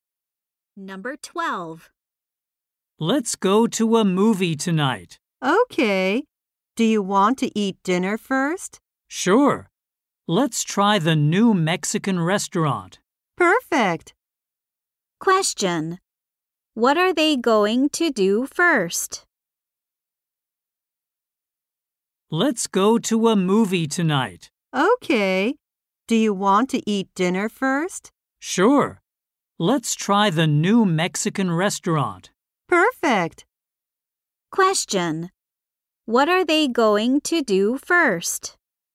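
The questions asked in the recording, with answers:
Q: Question. What are they going to do first?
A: Eat dinner.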